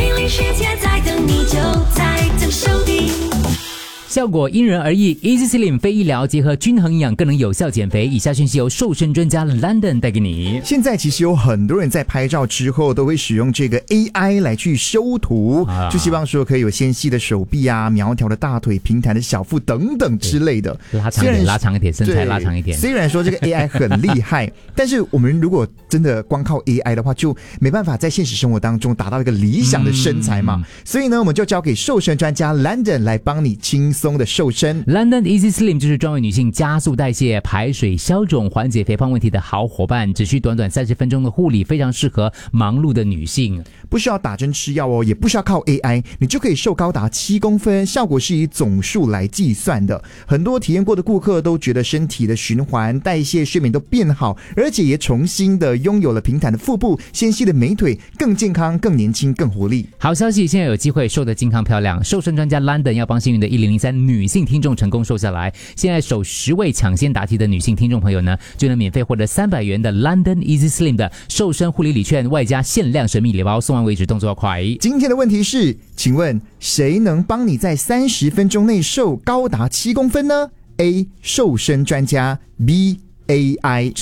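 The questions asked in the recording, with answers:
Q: 今天的问题是,请问谁能帮你在30分钟内瘦高达7公分呢 ?A.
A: A: 瘦身专家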